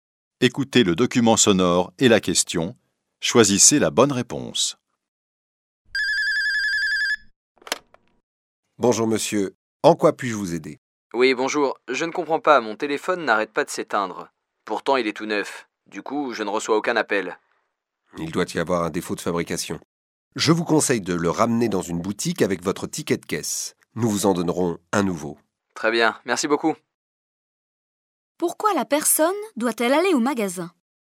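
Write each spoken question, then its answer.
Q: Pourquoi la personne doit-elle aller au magasin ?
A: Pour échanger son téléphone défectueux contre un nouveau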